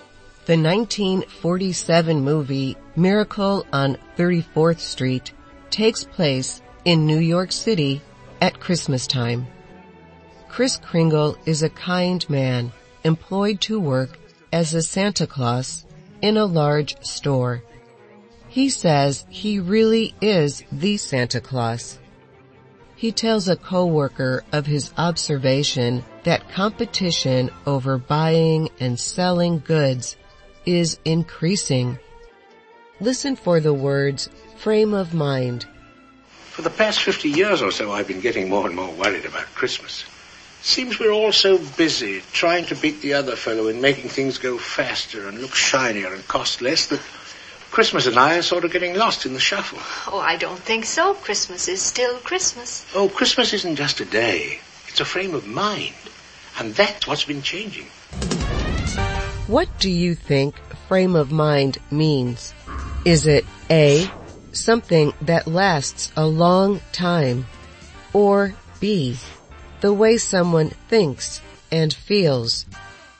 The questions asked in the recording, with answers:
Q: What do you think frame of mind means?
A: The answer is B. It is the way someone thinks and feels.